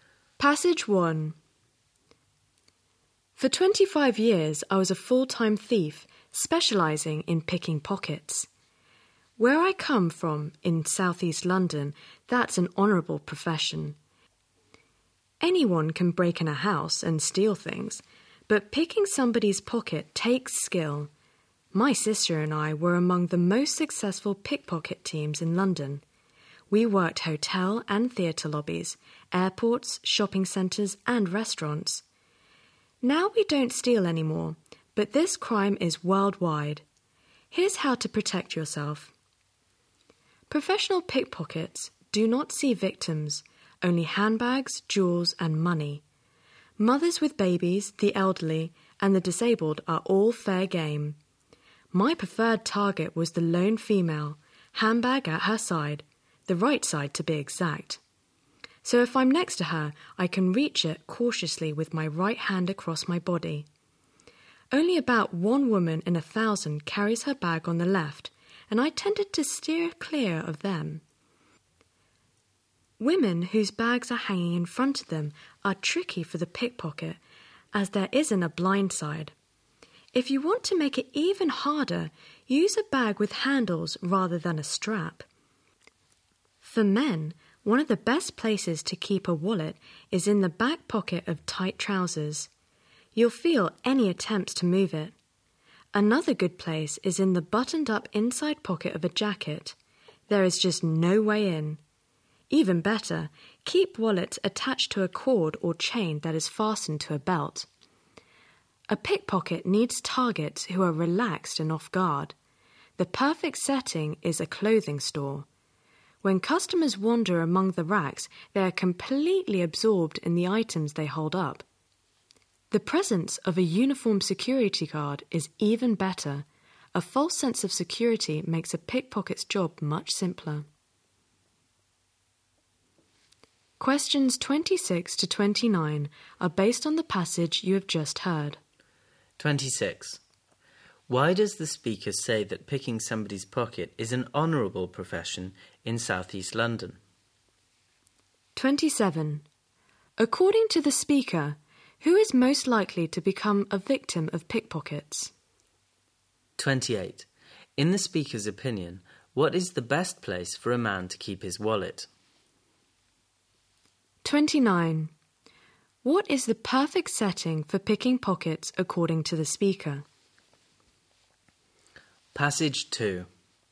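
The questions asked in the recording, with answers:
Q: Why does the speaker say that picking somebody's pocket is an honourable profession in southeast London?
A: Because it takes skill, unlike breaking into a house

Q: According to the speaker, who is most likely to become a victim of pickpockets?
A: A lone woman carrying her handbag on her right side

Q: What is the perfect setting for picking pockets according to the speaker?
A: A clothing store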